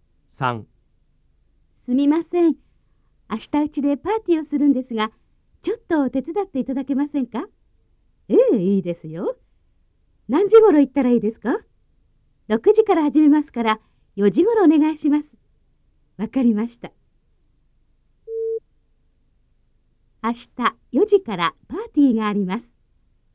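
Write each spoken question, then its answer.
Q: 明日4時からパーティーがあります。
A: 間違い(×):パーティーは6時から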